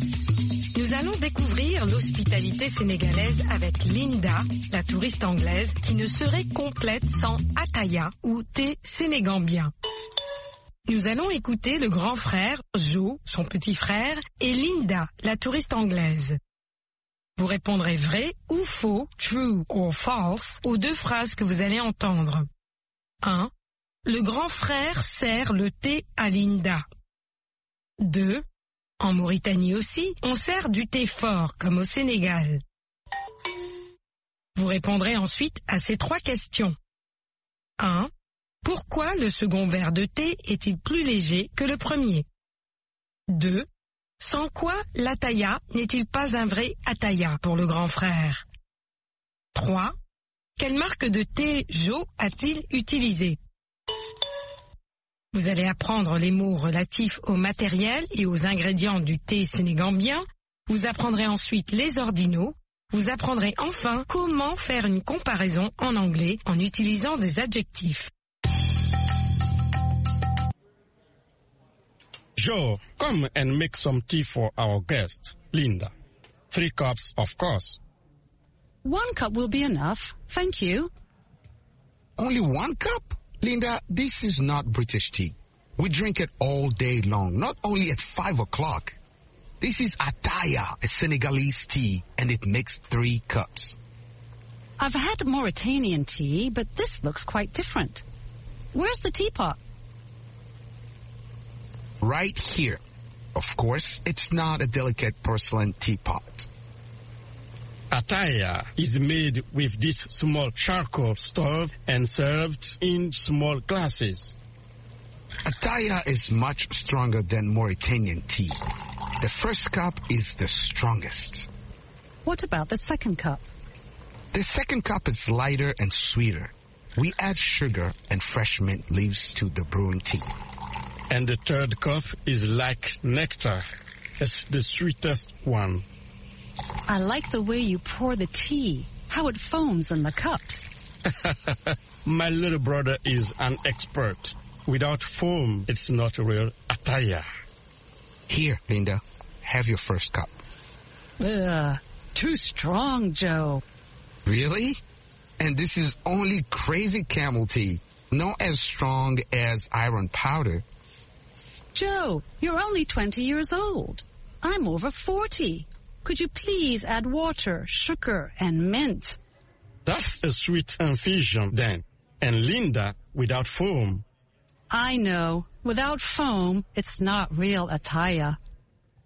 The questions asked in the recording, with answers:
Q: Le grand frère sert le thé à Linda.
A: L'énoncé 1 est faux.

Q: En Mauritanie aussi, on sert du thé fort, comme au Sénégal.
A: L'énoncé 2 est faux.

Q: Pourquoi le second verre de thé est-il plus léger que le premier?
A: Il est plus sucré et parfumé aux feuilles de menthe fraîches.

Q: Sans quoi l'Ataya n'est-il pas un vrai Ataya pour le grand frère?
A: Sans la mousse.

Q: Quelle marque de thé Joe a-t-il utilisé?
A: Crazy Camel.